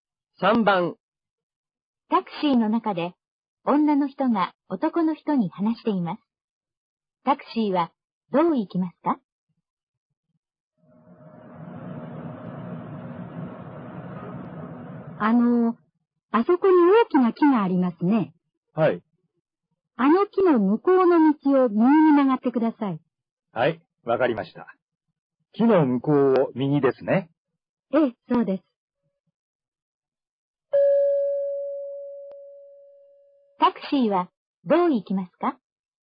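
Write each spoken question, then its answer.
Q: タクシーはどう行きますか?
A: 大きな木の向こうの道を右に曲がる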